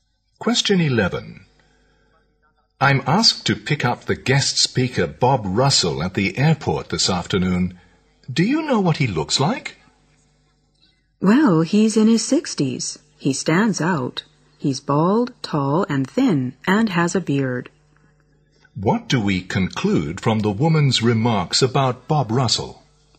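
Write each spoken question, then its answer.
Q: What do we conclude from the woman's remarks about Bob Russell?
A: He is easy to recognize.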